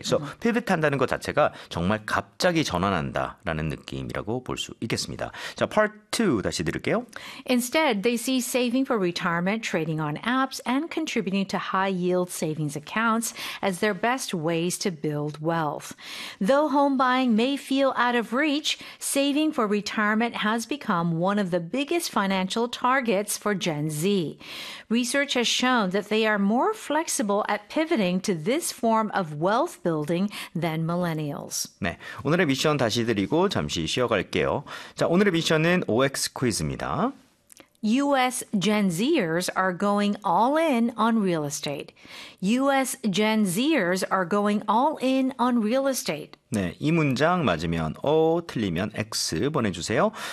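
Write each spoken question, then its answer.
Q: U.S. Gen Zers are going all in on real estate.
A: X (틀림)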